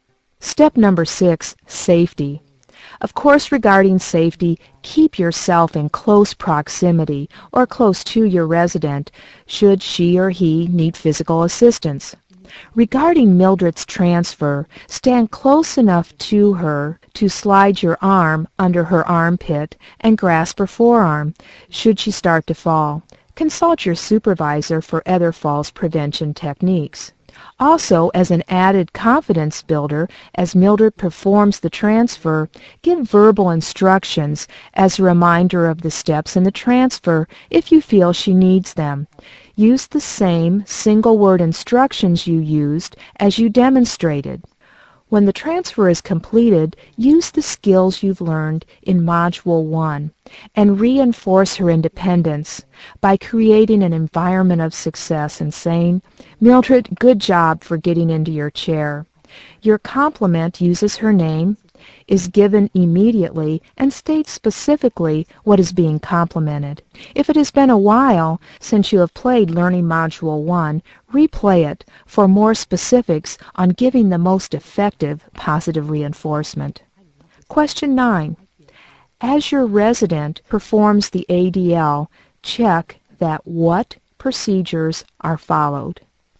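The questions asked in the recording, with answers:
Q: As your resident performs the ADL, check that what procedures are followed.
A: Safety (fall prevention) procedures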